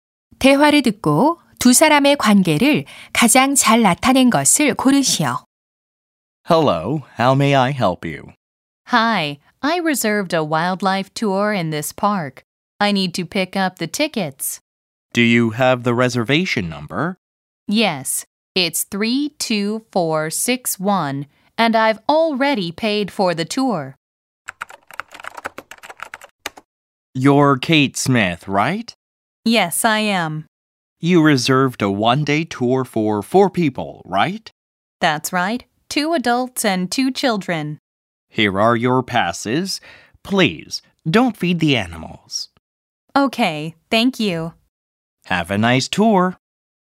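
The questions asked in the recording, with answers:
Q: 대화를 듣고 두 사람의 관계를 가장 잘 나타낸 것을 고르시오.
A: 공원 매표소 직원 — 관광객(투어 예약자)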